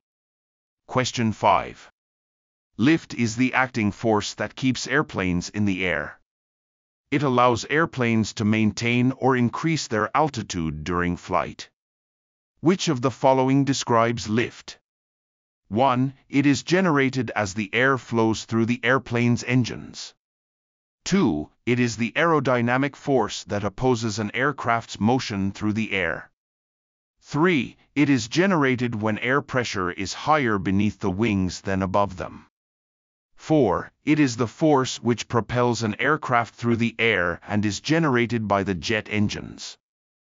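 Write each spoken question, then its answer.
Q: Which of the following describes lift?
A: 3: It is generated when air pressure is higher beneath the wings than above them.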